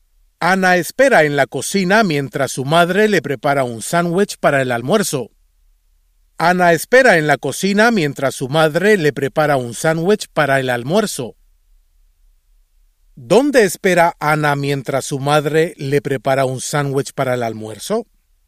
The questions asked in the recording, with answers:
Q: ¿Dónde espera Ana mientras su madre le prepara un sándwich para el almuerzo?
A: Ana espera en la cocina.